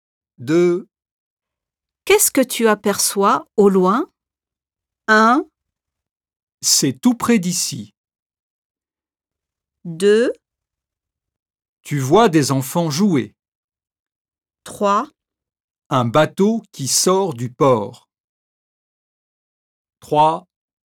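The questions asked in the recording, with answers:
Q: Qu'est-ce que tu aperçois au loin?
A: 3: Un bateau qui sort du port.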